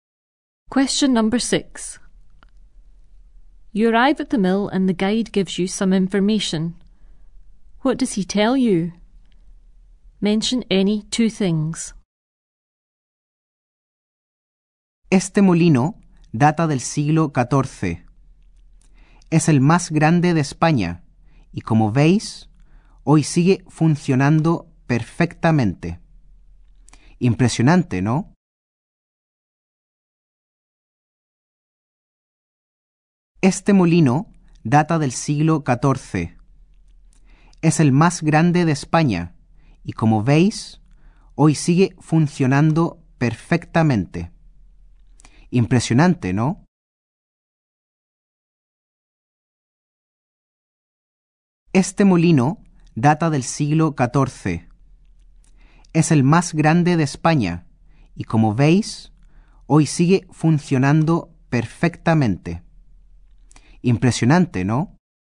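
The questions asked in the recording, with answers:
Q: What does he tell you?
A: The mill dates from the 14th century, is the biggest in Spain and still works perfectly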